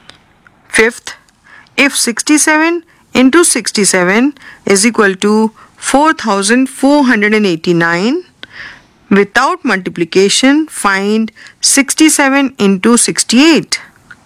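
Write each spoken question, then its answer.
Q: without multiplication, find 67 into 68.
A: 4556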